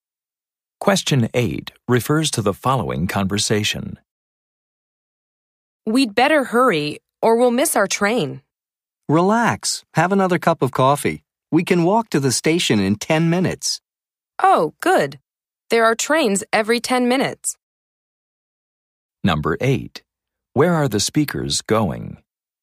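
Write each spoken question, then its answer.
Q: Where are the speakers going?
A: To the train station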